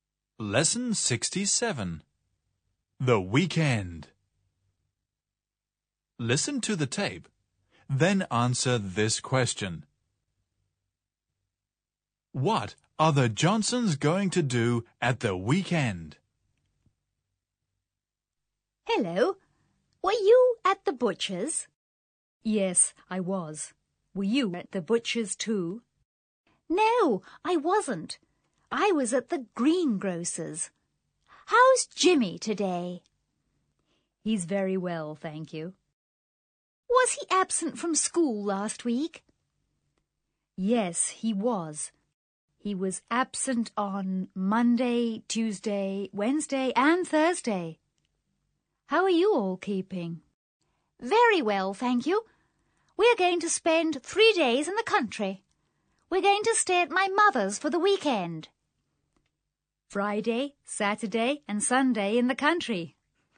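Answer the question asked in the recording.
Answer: Spend three days in the country at her mother's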